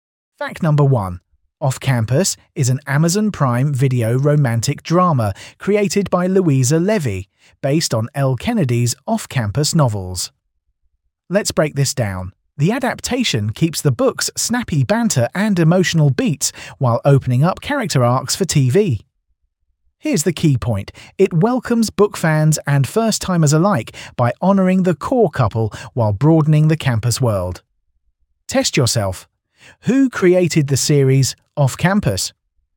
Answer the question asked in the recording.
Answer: Louisa Levy.